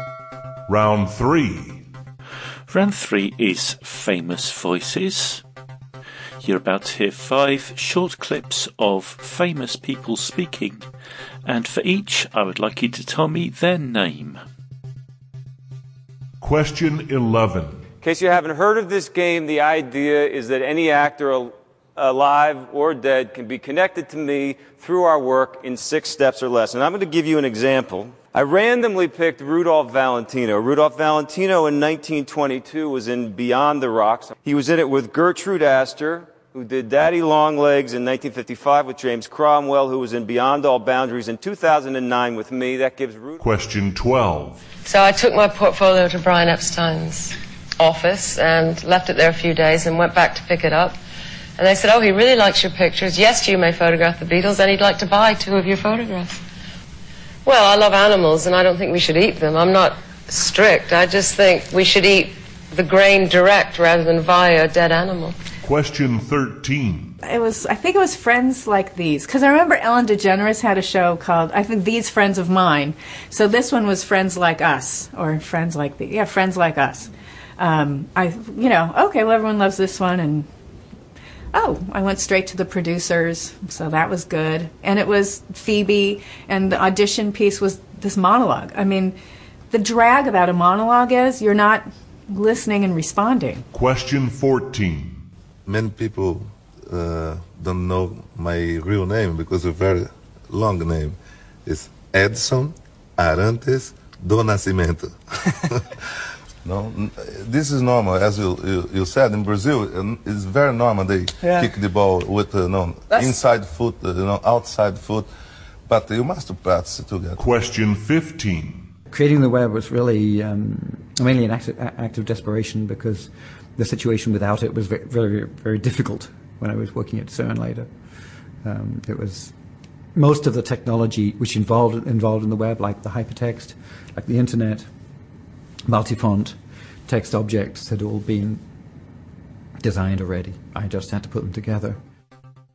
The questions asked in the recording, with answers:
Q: You're about to hear five short clips of famous people speaking, and for each, I would like you to tell me their name.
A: the answer to number 11 was Kevin Bacon

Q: You're about to hear five short clips of famous people speaking, and for each, I would like you to tell me their name.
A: Number 12 was Linda McCartney.

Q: You're about to hear five short clips of famous people speaking, and for each, I would like you to tell me their name.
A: Number 13 was Lisa Kudrow.

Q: You're about to hear five short clips of famous people speaking, and for each, I would like you to tell me their name.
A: Number 14 was Pelé.

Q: You're about to hear five short clips of famous people speaking, and for each, I would like you to tell me their name.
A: And number 15 was Tim Berners-Lee.